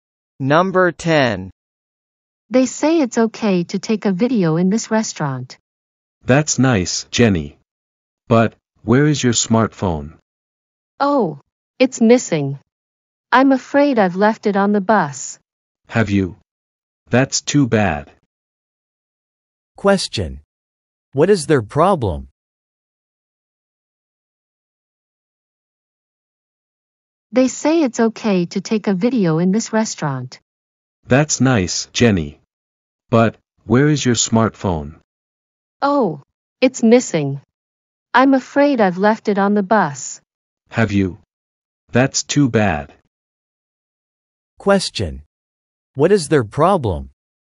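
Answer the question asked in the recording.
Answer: Jenny's smartphone is missing; she left it on the bus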